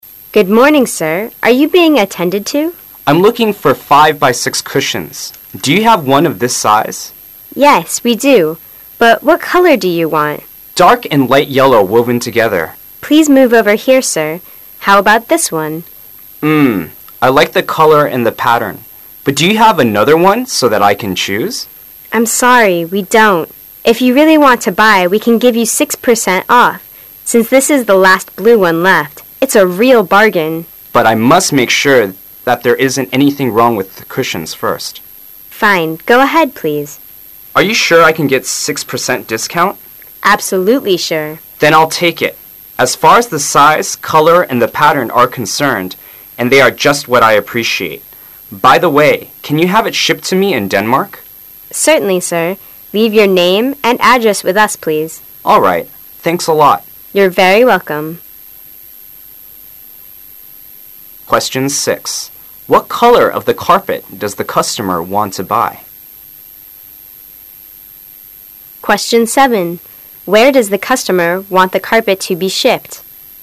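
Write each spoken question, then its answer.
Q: Where does the customer want the carpet to be shipped?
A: Denmark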